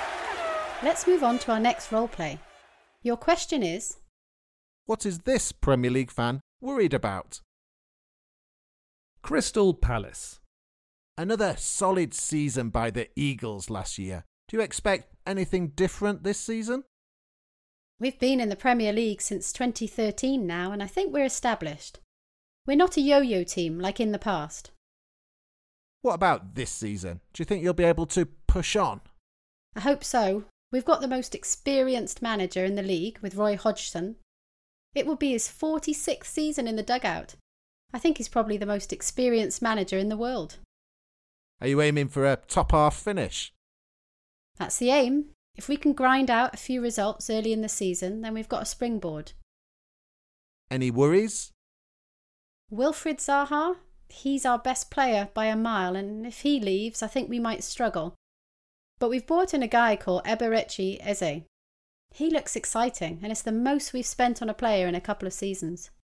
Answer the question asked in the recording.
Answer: She was worried about Palace's star player, Wilfried Zaha, leaving the club.